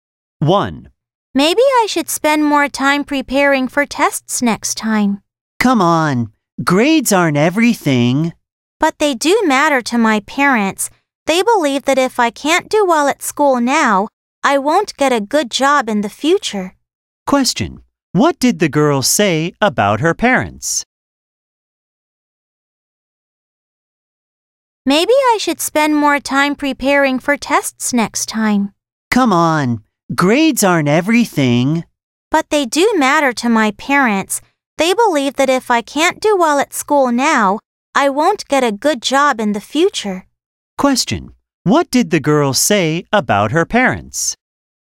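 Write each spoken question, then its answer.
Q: What did the girl say about her parents?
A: They think grades matter for getting a good job in the future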